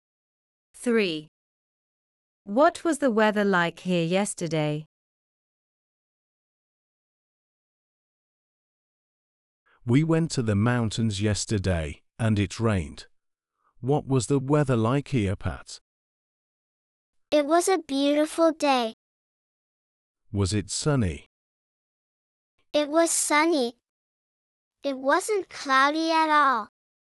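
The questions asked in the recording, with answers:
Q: What was the weather like here yesterday?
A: Sunny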